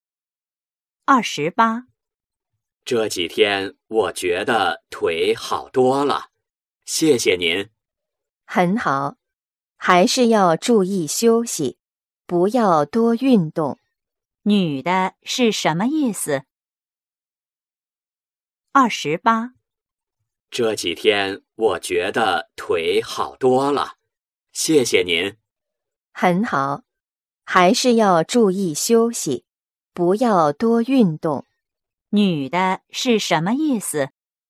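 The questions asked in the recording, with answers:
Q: 女的是什么意思?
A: 要男的注意休息,不要多运动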